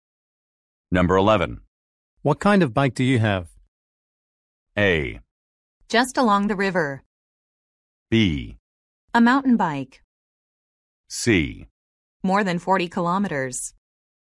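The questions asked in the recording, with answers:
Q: What kind of bike do you have?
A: B: A mountain bike.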